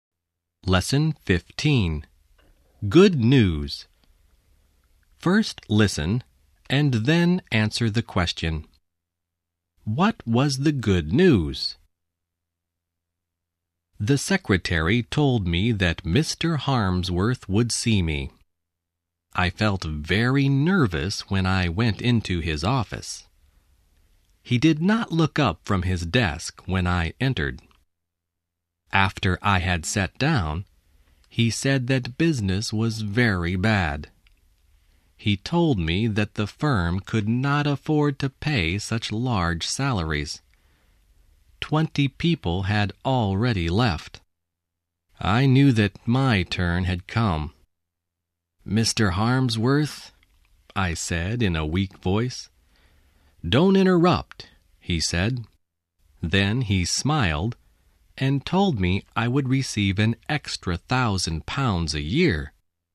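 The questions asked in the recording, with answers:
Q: What was the good news?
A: He would receive an extra £1,000 a year.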